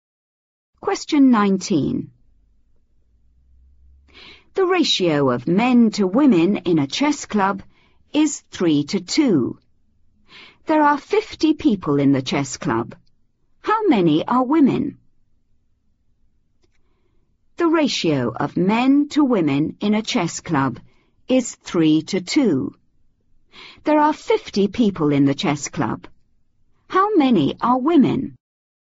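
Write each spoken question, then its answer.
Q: How many are women?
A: 20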